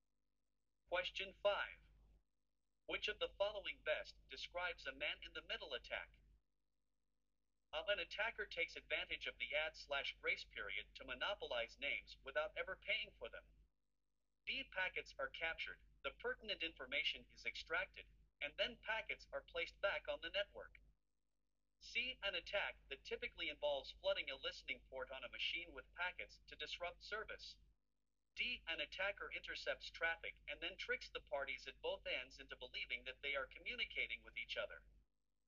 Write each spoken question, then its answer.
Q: Which of the following best describes a man-in-the-middle attack?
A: The correct answer is D.